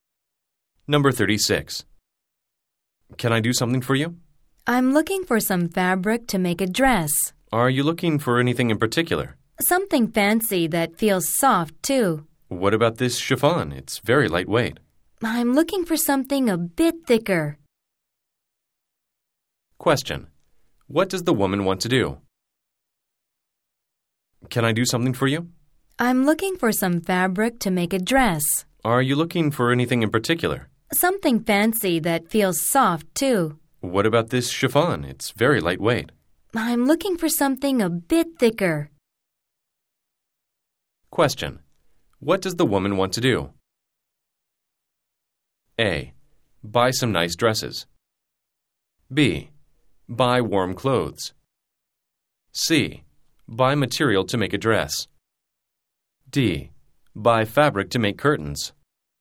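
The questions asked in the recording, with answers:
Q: What does the woman want to do?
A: C: Buy material to make a dress.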